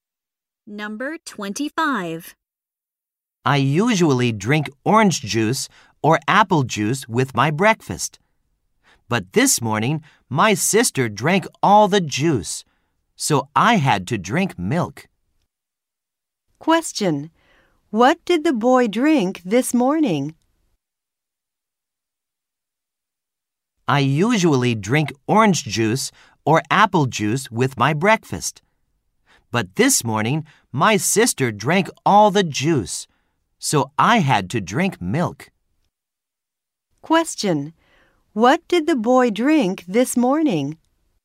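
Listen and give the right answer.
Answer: Milk.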